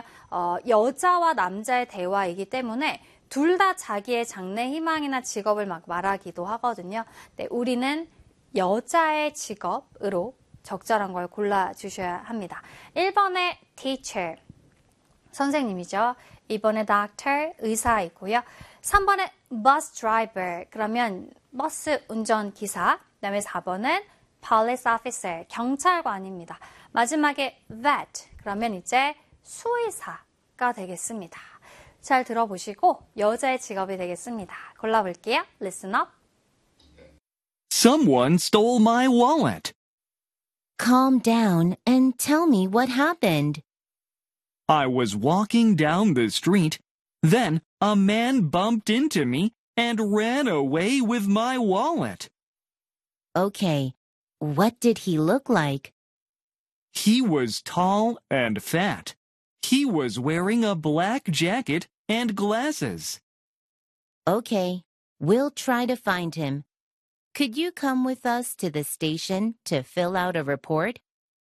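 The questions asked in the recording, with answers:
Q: 네, 우리는 여자의 직업으로 적절한 걸 골라주셔야 합니다.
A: 4: police officer, 경찰관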